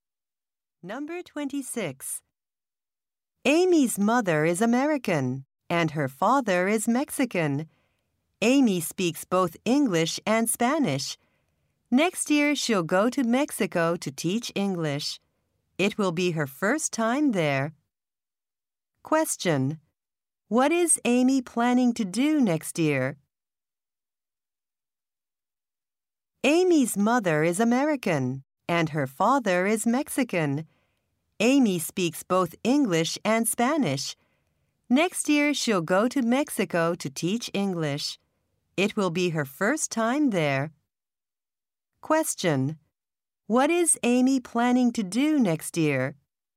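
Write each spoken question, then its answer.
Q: What is Amy planning to do next year?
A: Teach English in Mexico.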